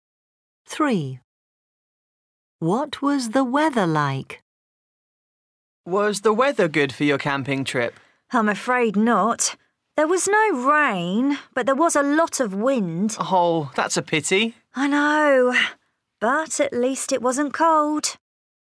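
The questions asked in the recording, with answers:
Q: What was the weather like?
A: windy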